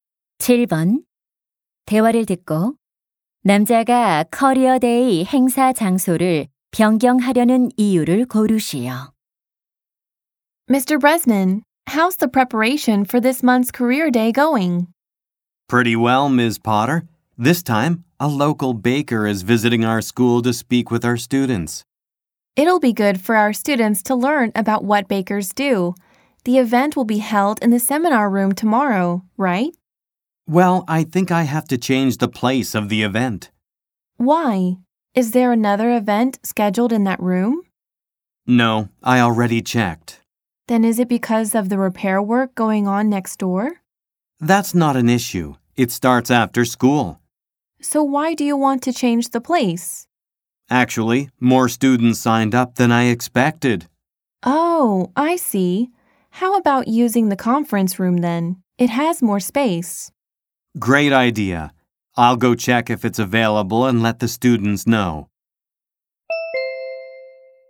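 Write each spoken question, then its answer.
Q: 대화를 듣고 남자가 커리어 데이 행사 장소를 변경하려는 이유를 고르시오.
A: 예상보다 많은 학생이 신청해서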